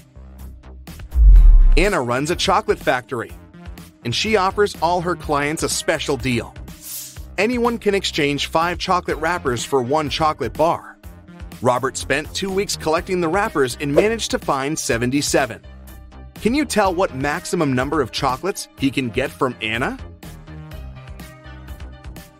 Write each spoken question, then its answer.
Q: Can you tell what maximum number of chocolates he can get from Anna?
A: Robert can get a total of 19 chocolates.